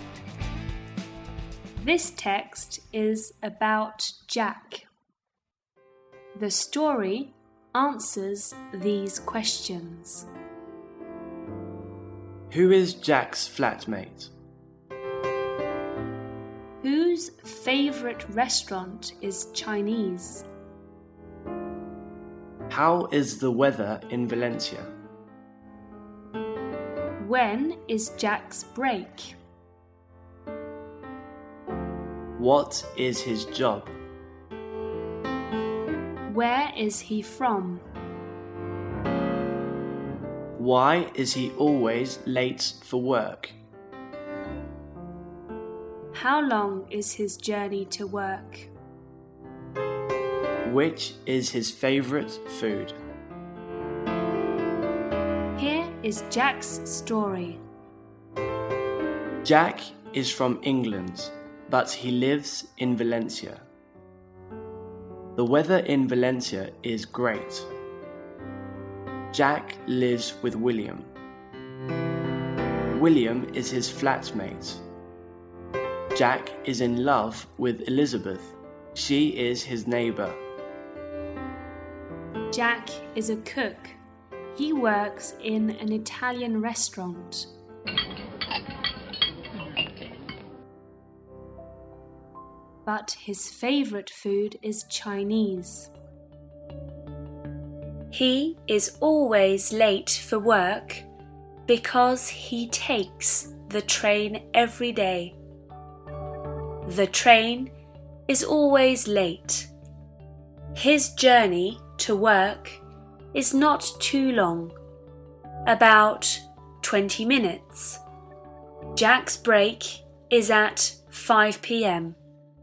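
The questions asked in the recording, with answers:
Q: Who is Jack's flatmate?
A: William

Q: How is the weather in Valencia?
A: Great

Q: When is Jack's break?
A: At 5 p.m.

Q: What is his job?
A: He is a cook

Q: Where is he from?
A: England

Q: Why is he always late for work?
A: Because he takes the train and the train is always late

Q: How long is his journey to work?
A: About 20 minutes

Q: Which is his favourite food?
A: Chinese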